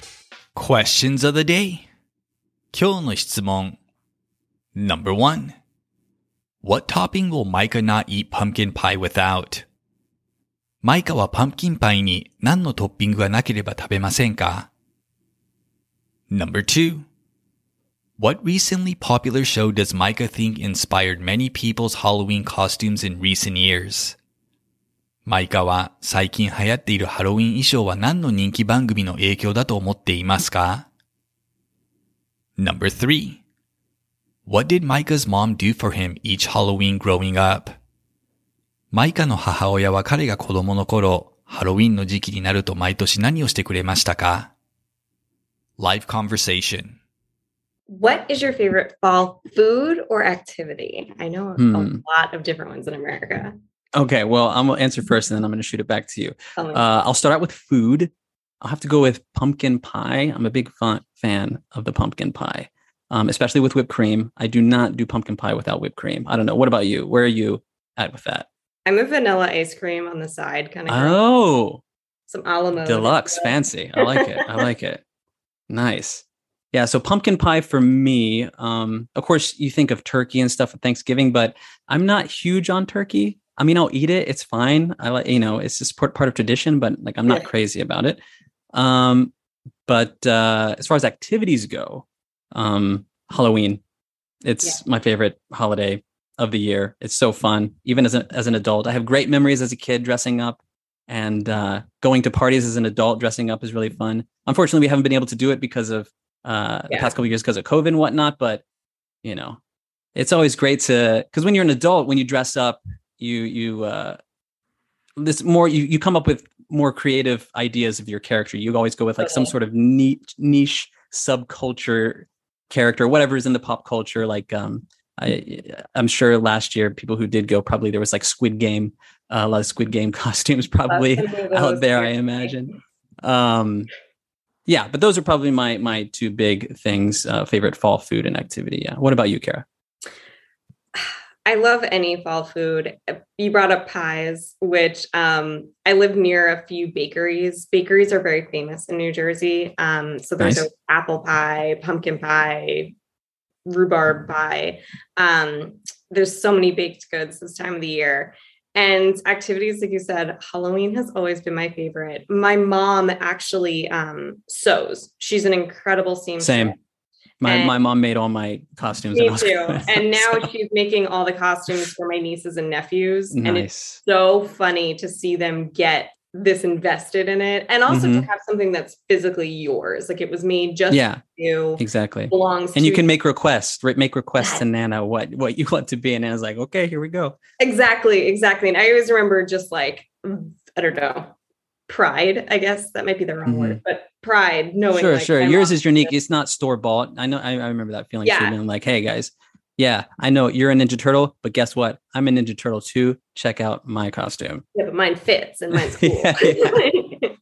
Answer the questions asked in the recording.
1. He will not eat pumpkin pie without whipped cream.
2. He thinks the popular show Squid Game likely influenced many adult Halloween costumes in recent years.
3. While growing up, Micah's mom handmade all of his costumes.